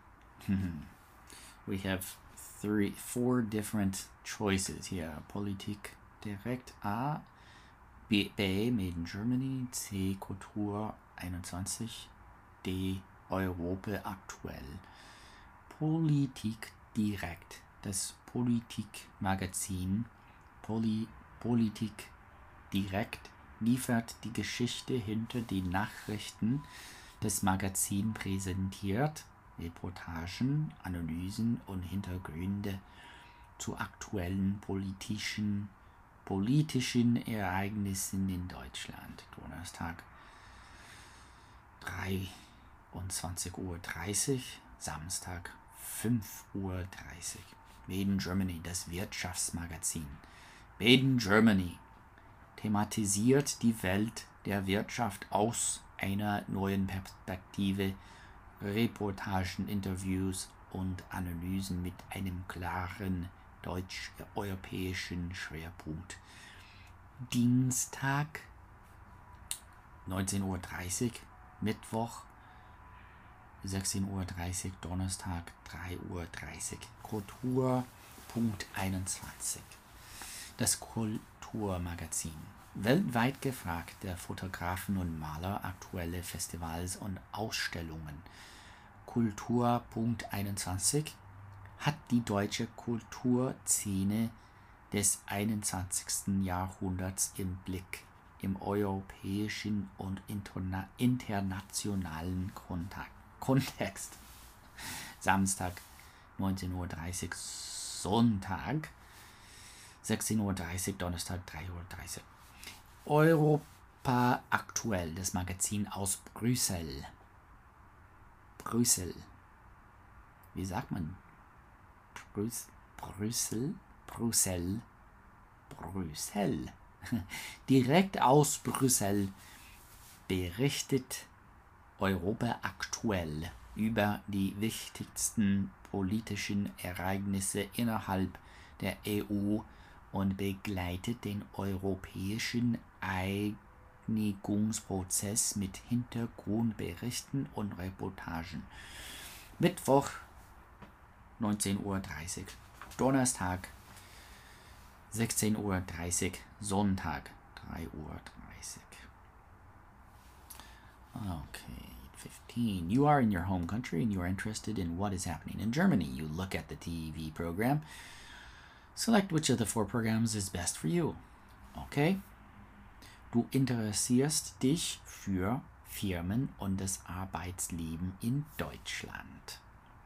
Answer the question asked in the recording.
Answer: Buchstabe B.